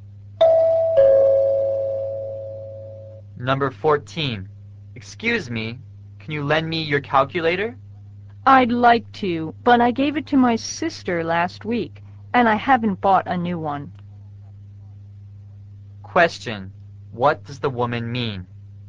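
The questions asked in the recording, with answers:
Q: what does the woman mean?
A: She can't lend it because she gave it to her sister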